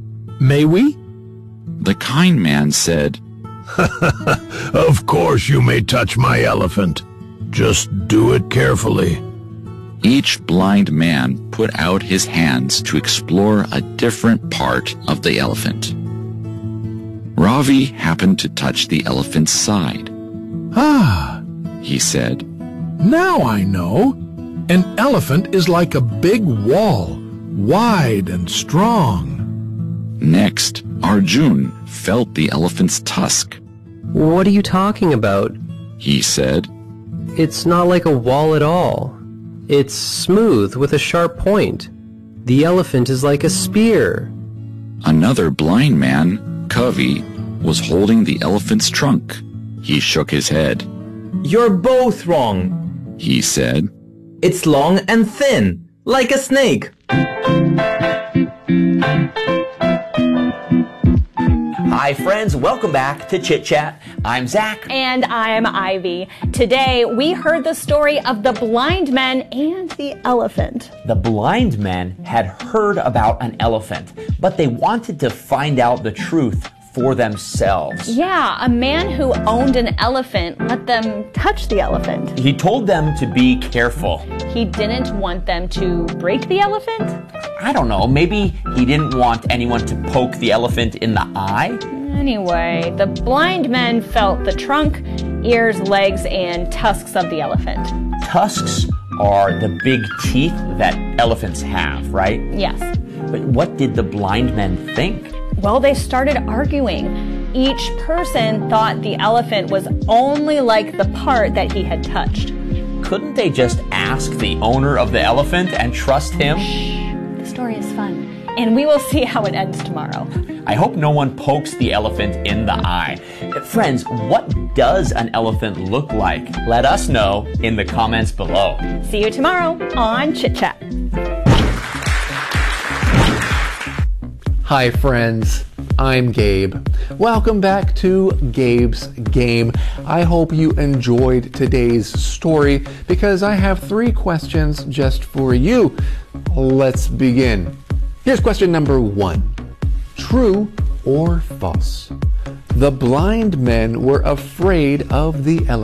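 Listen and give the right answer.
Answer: False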